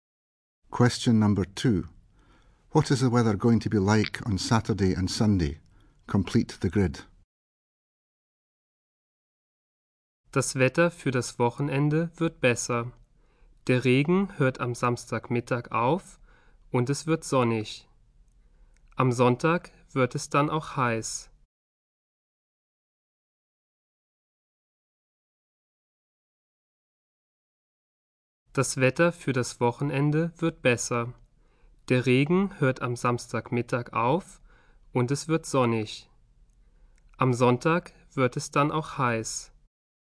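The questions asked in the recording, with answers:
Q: What is the weather going to be like on Saturday and Sunday?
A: Saturday: the rain stops at midday and it turns sunny; Sunday: hot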